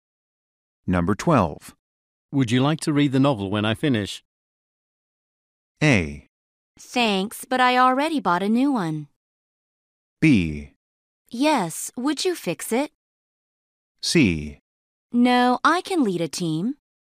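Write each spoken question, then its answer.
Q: Would you like to read the novel when I finish?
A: A: Thanks, but I already bought a new one.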